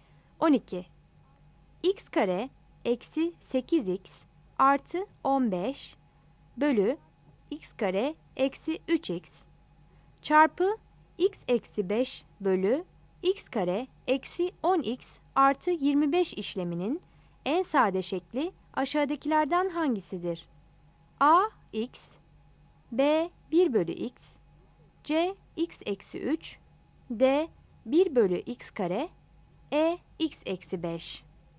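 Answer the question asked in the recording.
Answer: B: 1 bölü x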